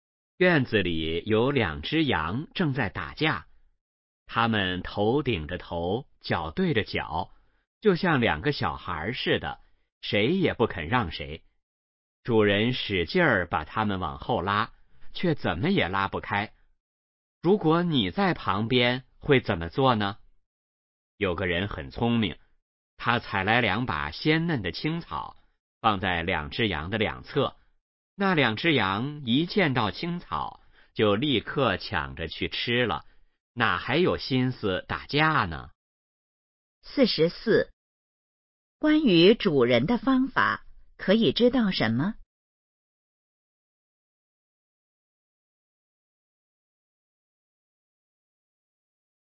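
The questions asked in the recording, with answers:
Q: 那两只羊看见青草后是什么反应?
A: 立刻抢着去吃,不打架了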